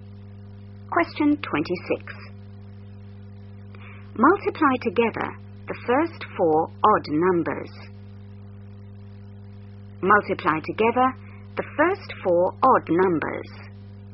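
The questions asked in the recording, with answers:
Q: Multiply together the first four odd numbers.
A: 105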